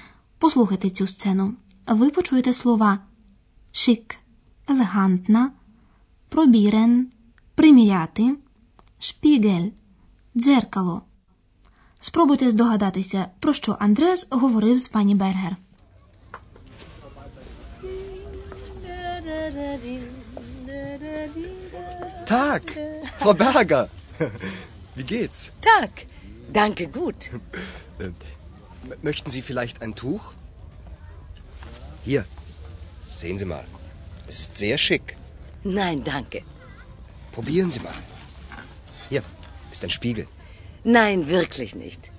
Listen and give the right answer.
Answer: Андреас розхвалює гостину як може.